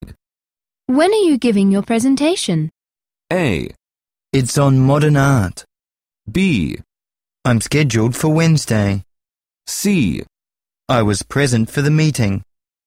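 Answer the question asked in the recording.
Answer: B: I'm scheduled for Wednesday.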